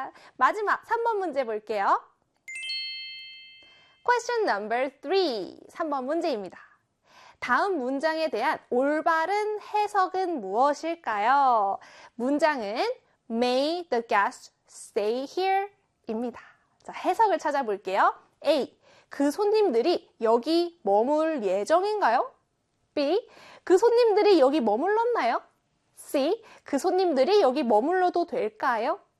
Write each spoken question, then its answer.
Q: 다음 문장에 대한 올바른 해석은 무엇일까요?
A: 네, 바로 C에 그 손님들이 여기 머물러도 될까요?